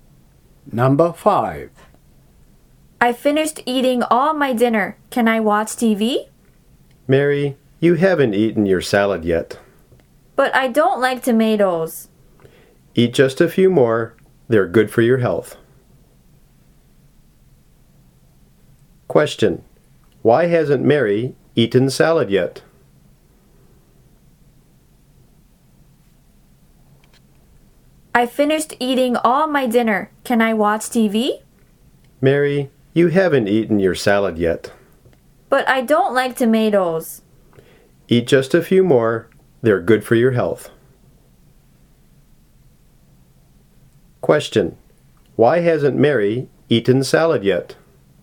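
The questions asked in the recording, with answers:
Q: Why hasn't Mary eaten salad yet?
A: Because she doesn't like tomatoes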